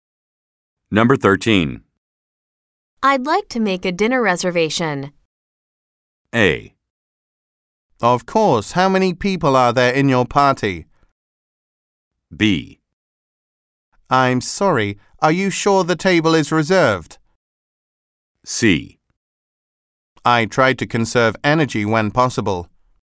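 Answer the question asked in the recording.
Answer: A: Of course, how many people are there in your party?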